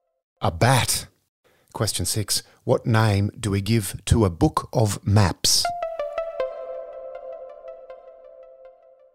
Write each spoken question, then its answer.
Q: What name do we give to a book of maps?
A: An atlas.